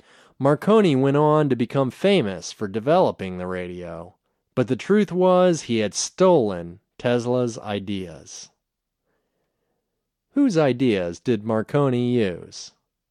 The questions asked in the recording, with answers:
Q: Whose ideas did Marconi use?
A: Marconi used Tesla's ideas.